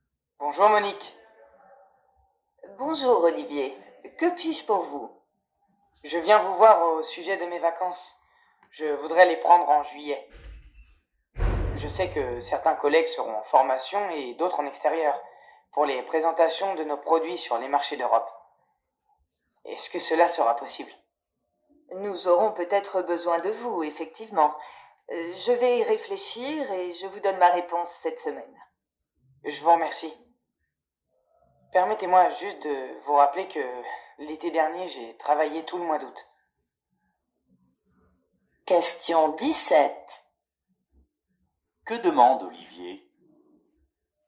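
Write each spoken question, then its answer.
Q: Que demande Olivier ?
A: Prendre ses vacances en juillet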